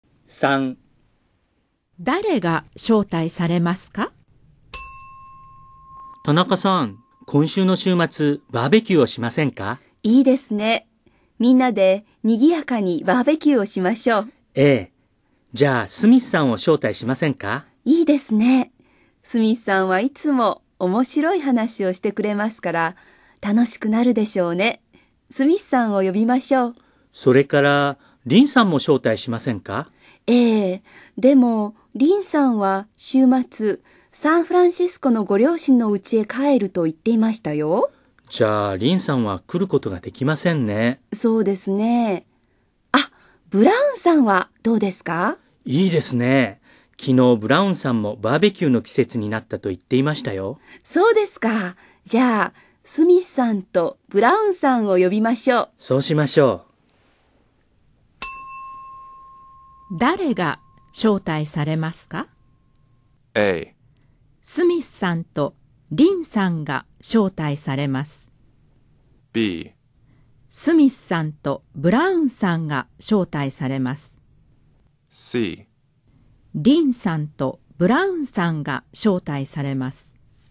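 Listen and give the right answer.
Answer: B: スミスさんとブラウンさんが招待されます。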